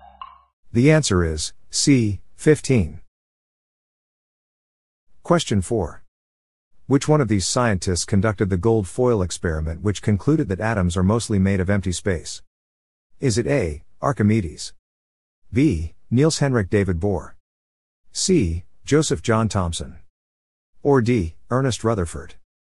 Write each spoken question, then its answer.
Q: Which one of these scientists conducted the gold foil experiment which concluded that atoms are mostly made of empty space?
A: The answer is D, Ernest Rutherford.